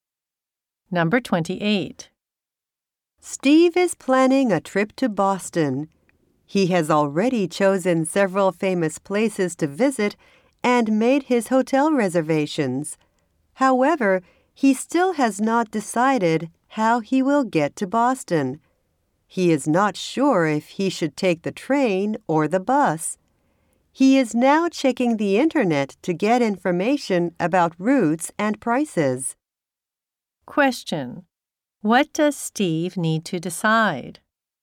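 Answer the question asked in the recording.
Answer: Whether to take the train or the bus to Boston.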